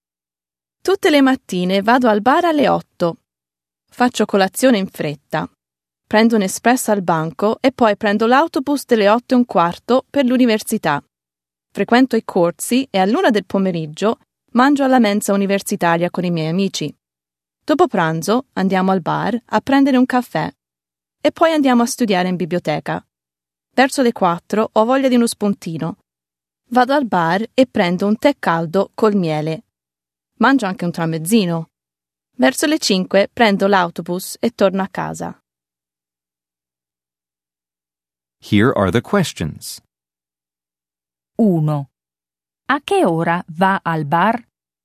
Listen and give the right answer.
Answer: Alle 8.